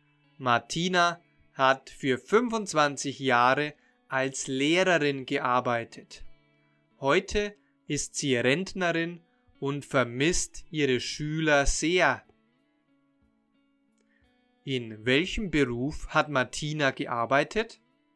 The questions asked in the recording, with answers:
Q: In welchem Beruf hat Martina gearbeitet?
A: Sie hat als Lehrerin gearbeitet.